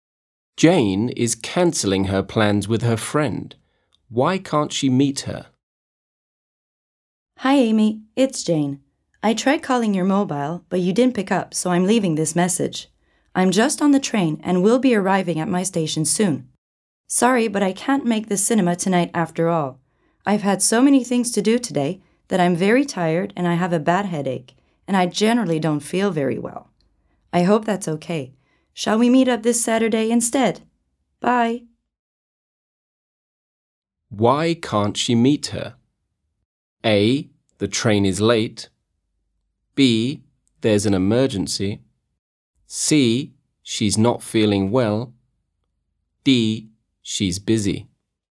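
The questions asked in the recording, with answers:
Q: Why can't she meet her?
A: C: She's not feeling well.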